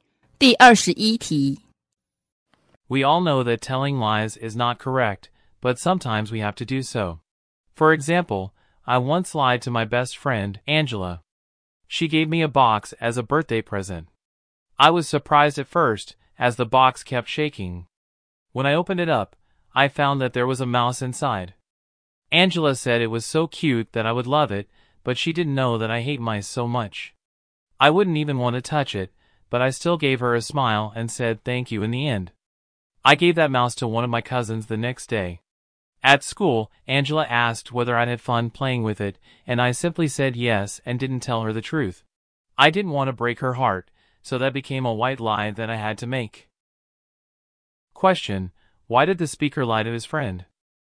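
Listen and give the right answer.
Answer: He didn't want to break her heart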